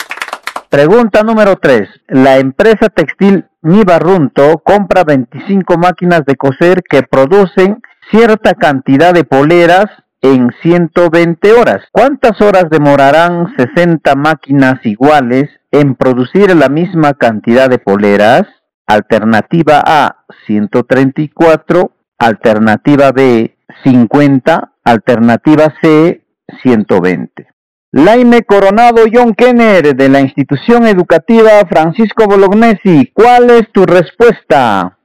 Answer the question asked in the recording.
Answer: La respuesta correcta es la alternativa B, 50.